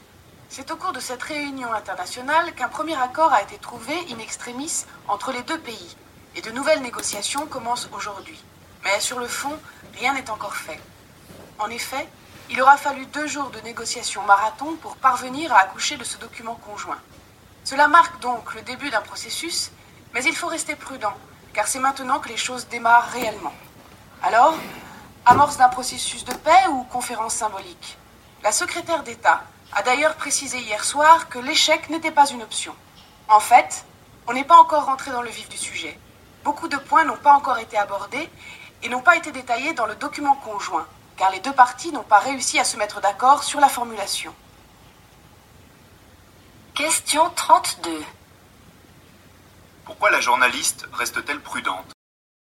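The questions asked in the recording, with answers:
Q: Pourquoi la journaliste reste-t-elle prudente ?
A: Beaucoup de points n'ont pas encore été abordés ni réglés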